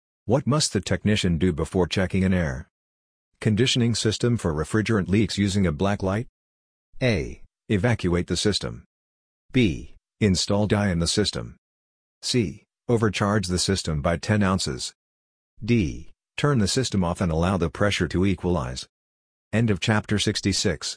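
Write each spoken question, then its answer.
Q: What must the technician do before checking an air conditioning system for refrigerant leaks using a black light?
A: B: Install dye in the system.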